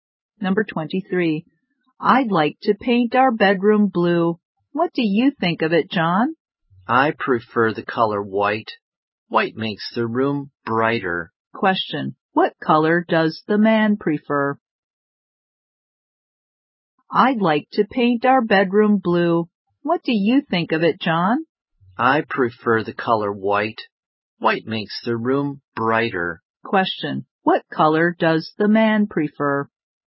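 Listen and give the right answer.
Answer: White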